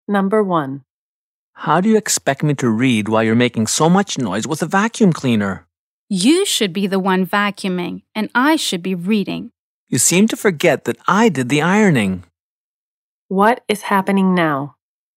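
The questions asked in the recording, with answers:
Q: What is happening now?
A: One person is vacuuming while the other is trying to read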